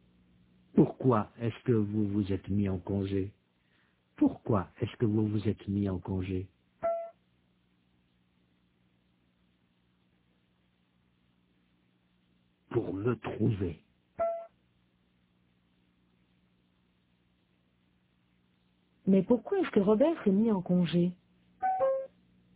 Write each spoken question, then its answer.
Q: Mais pourquoi est-ce que Robert s'est mis en congé?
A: Pour se trouver.